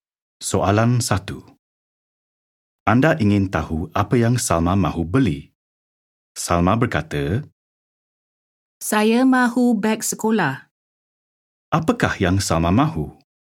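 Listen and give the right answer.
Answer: Beg sekolah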